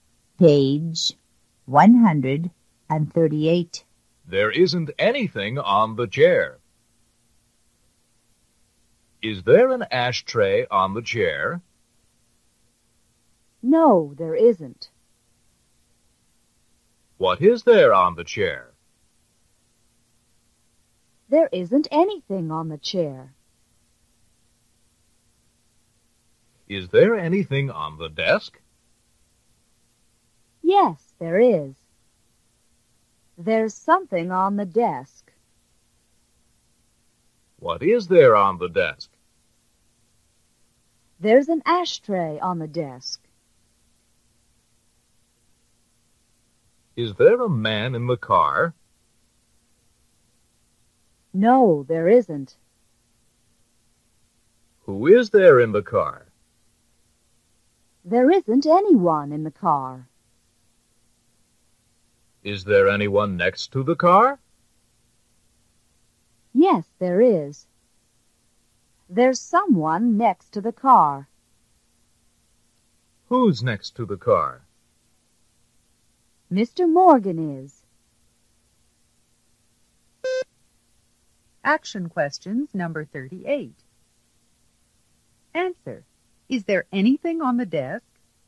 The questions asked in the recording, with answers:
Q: Answer. Is there anything on the desk?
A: Yes, there is.